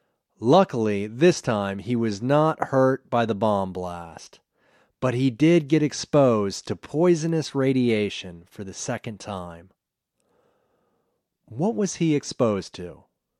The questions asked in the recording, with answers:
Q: What was he exposed to?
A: He was exposed to poisonous radiation.